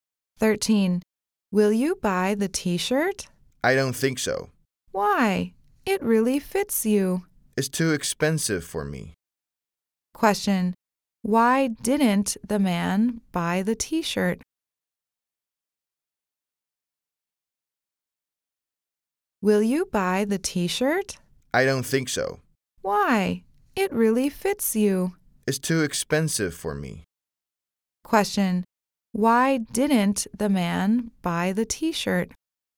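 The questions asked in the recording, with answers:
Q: Question. Why didn't the man buy the t-shirt?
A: It's too expensive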